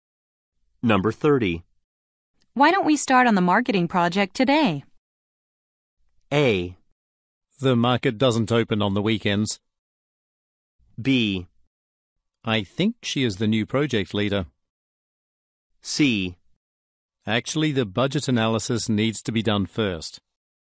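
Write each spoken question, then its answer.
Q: Why don't we start on the marketing project today?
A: C: Actually, the budget analysis needs to be done first.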